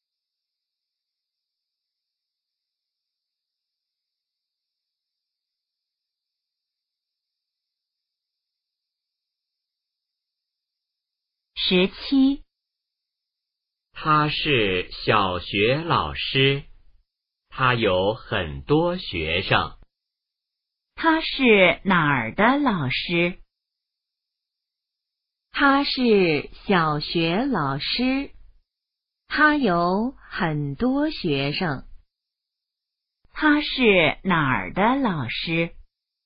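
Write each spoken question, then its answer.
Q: 他是哪儿的老师?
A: 小学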